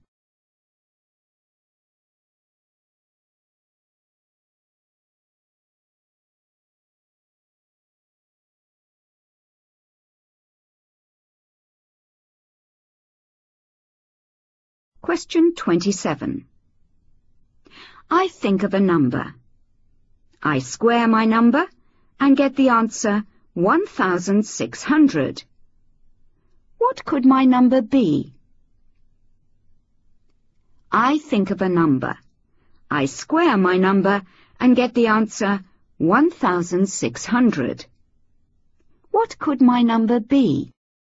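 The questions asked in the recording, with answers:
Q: What could my number be?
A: 40 (or −40)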